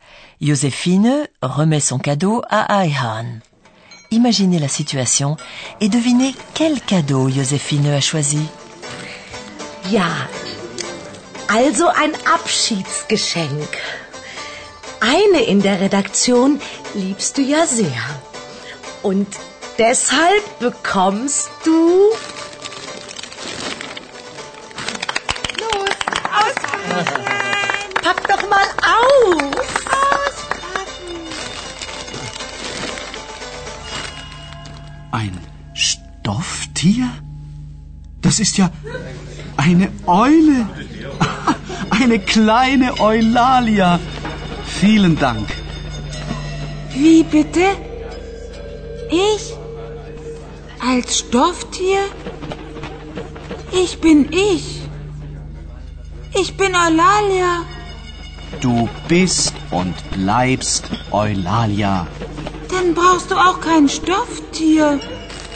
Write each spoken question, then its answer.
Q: Imaginez la situation et devinez quel cadeau Joséphine a choisi.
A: Vous avez certainement compris que le cadeau est une chouette.